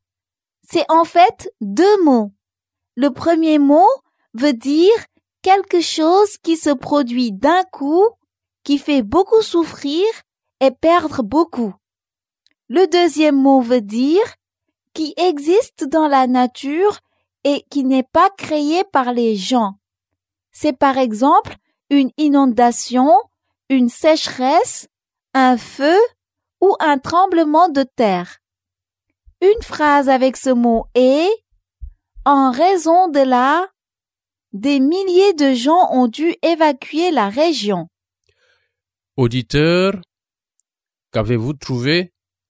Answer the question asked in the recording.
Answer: Le mot mystère est « Catastrophe naturelle. »